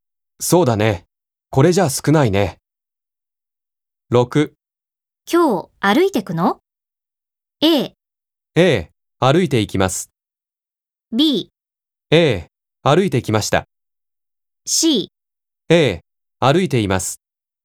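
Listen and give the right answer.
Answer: A: 歩いていきます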